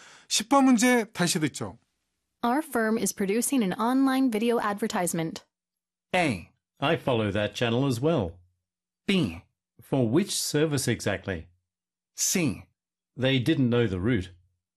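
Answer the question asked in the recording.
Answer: B: For which service exactly?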